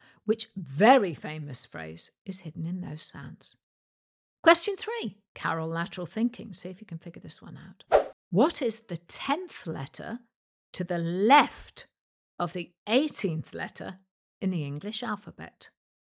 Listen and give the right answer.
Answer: And the answer is the letter H.